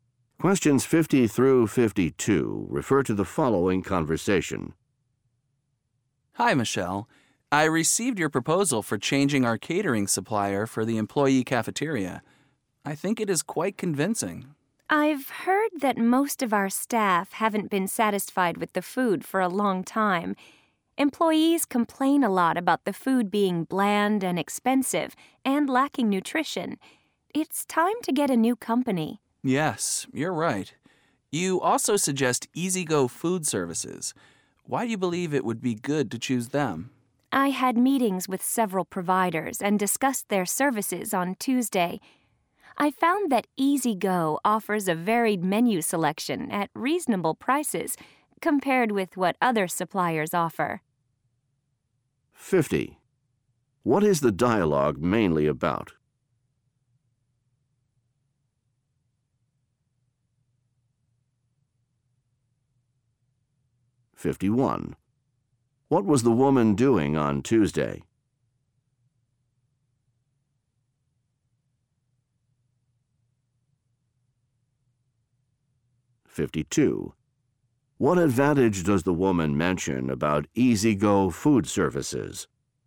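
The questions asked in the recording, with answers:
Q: What is the dialogue mainly about?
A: Changing the cafeteria catering supplier

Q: What was the woman doing on Tuesday?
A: Meeting several providers

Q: What advantage does the woman mention about EasyGo Food Services?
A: A varied menu at reasonable prices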